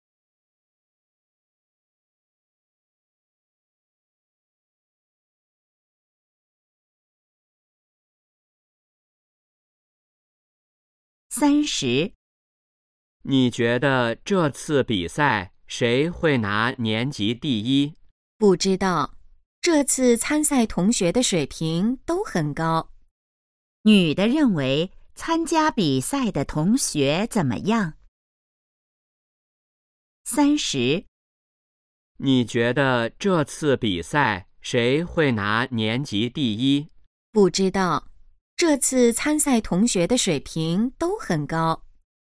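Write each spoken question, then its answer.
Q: 女的认为参加比赛的同学怎么样?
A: 水平都很高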